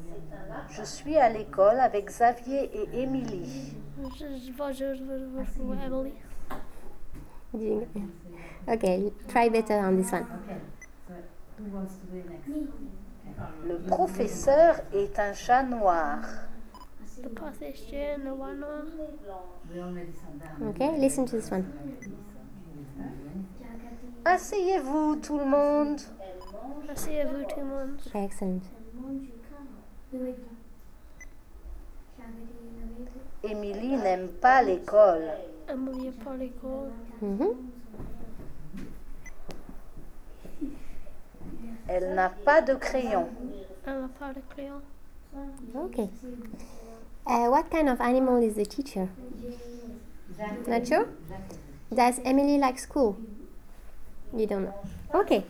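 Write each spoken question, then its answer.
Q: What kind of animal is the teacher?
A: A black cat

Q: Does Emily like school?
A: No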